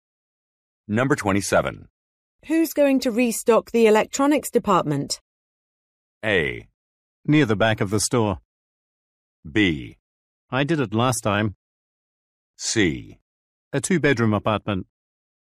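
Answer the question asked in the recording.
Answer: B: I did it last time.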